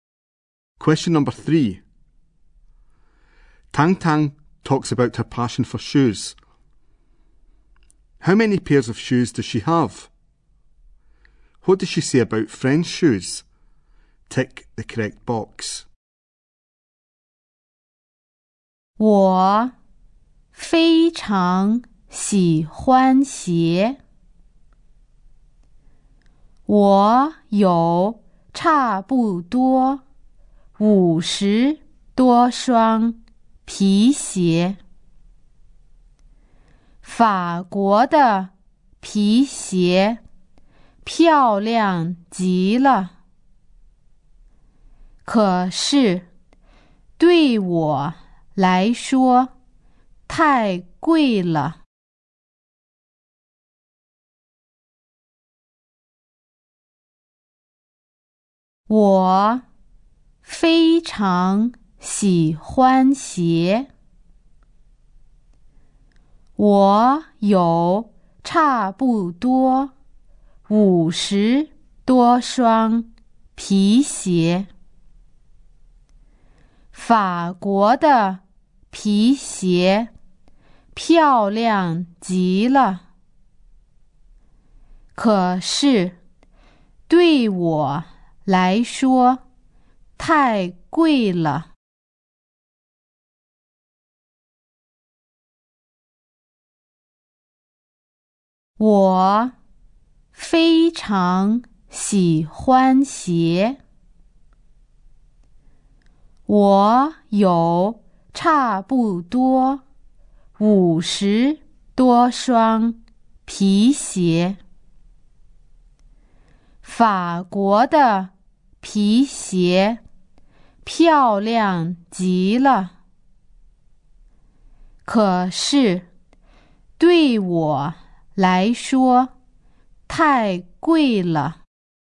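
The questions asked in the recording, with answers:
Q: How many pairs of shoes does she have?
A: About fifty (50-odd) pairs

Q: What does she say about friend shoes?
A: French shoes are very beautiful but too expensive for her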